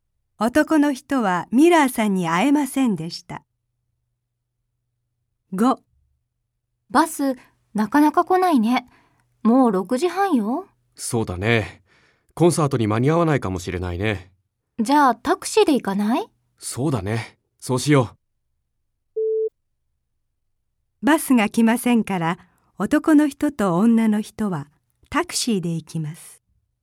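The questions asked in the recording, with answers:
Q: バスが来ませんから、男の人と女の人はタクシーで行きます。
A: ○(正しい)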